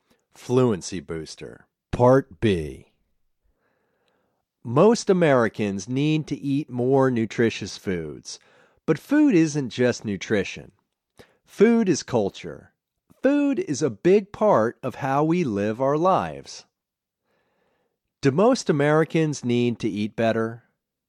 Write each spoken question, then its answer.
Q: Do most Americans need to eat better?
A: Yes, most Americans need to eat better.